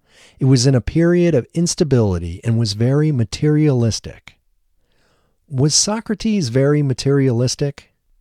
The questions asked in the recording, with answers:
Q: Was Socrates very materialistic?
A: No, Socrates wasn't very materialistic.